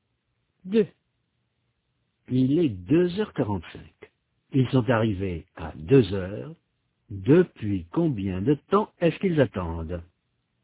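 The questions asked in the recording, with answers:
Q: Depuis combien de temps est-ce qu'ils attendent?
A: Trois quarts d'heure (45 minutes)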